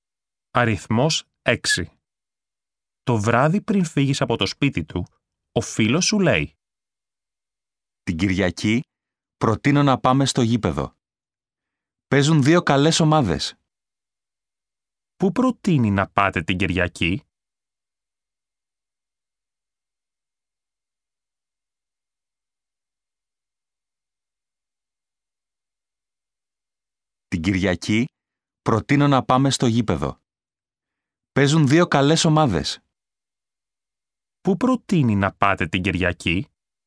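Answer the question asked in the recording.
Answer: Στο γήπεδο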